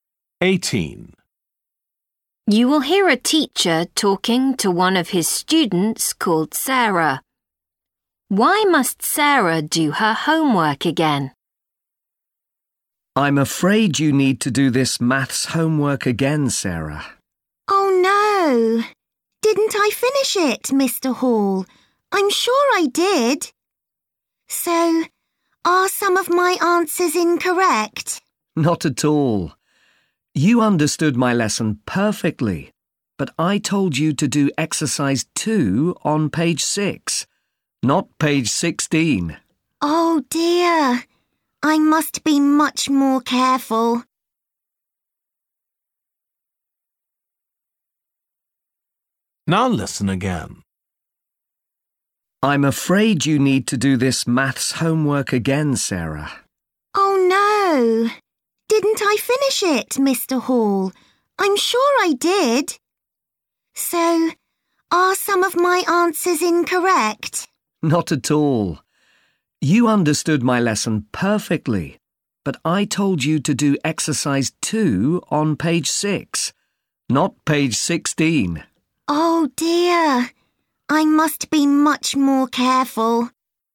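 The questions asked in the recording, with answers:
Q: Why must Sarah do her homework again?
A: She did the exercise on the wrong page (16 instead of 6)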